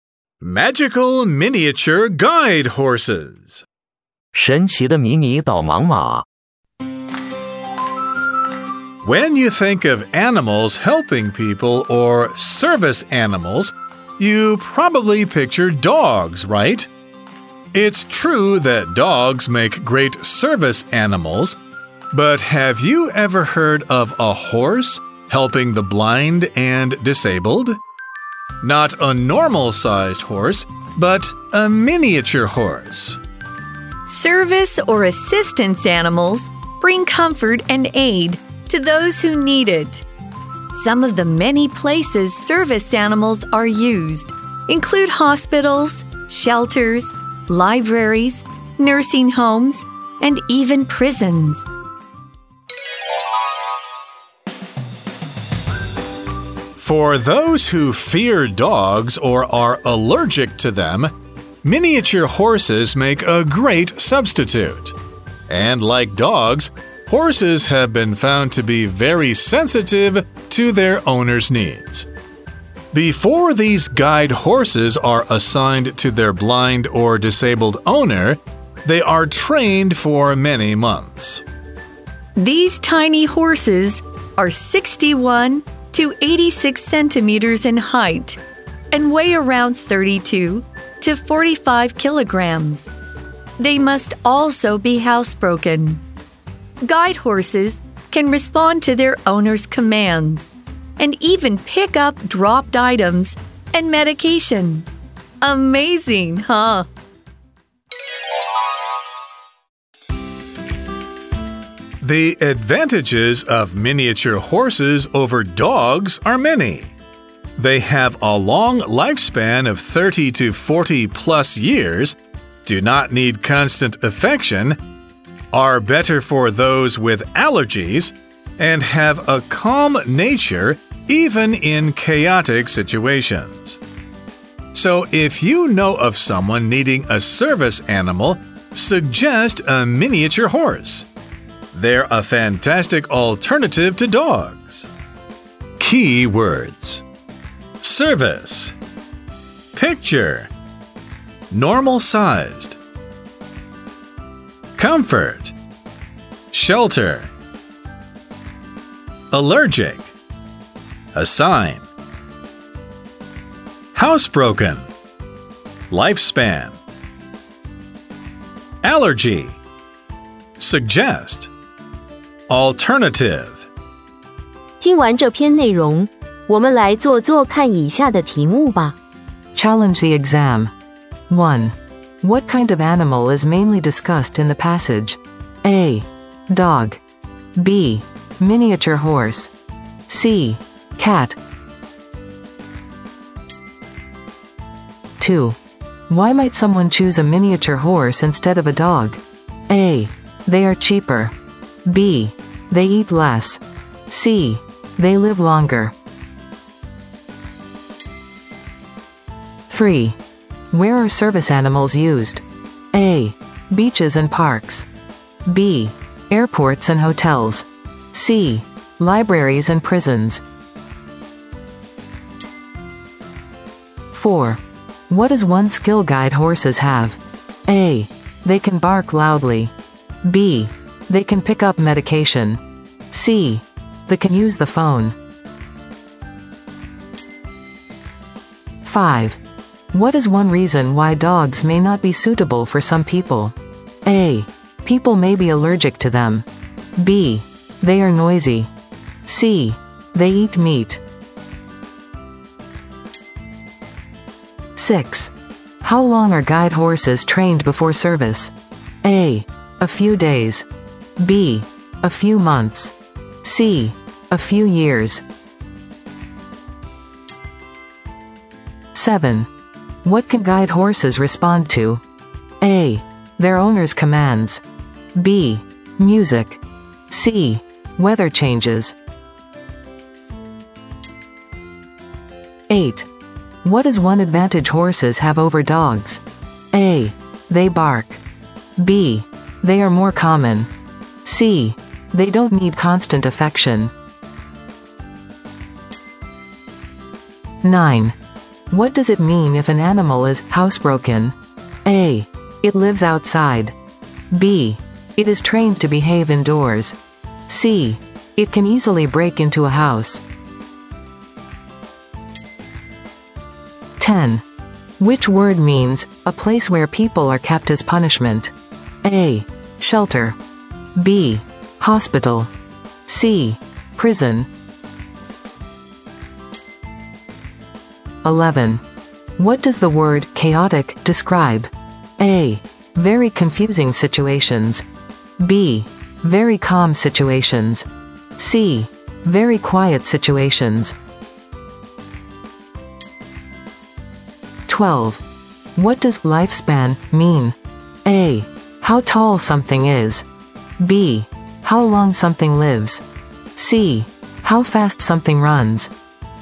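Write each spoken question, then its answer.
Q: What kind of animal is mainly discussed in the passage?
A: B: Miniature horse.

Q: Why might someone choose a miniature horse instead of a dog?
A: C: They live longer.

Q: Where are service animals used?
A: C: Libraries and prisons.

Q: What does one skill guide horses have?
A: B: They can pick up medication.

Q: What is one reason why dogs may not be suitable for some people?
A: A: People may be allergic to them.

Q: How long are guide horses trained before service?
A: B: A few months.

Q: What can guide horses respond to?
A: A: Their owner's commands.

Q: What is one advantage horses have over dogs?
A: C: They don't need constant affection.

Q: What does it mean if an animal is housebroken?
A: B: It is trained to behave indoors.

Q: Which word means a place where people are kept as punishment?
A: C: Prison.

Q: What does the word chaotic describe?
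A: A: Very confusing situations.

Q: What does lifespan mean?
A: B: How long something lives.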